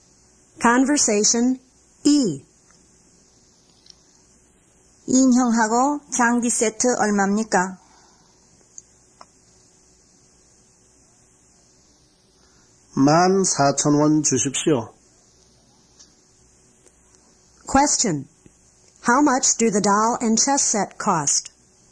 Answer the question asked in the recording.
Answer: They cost 14,000 won.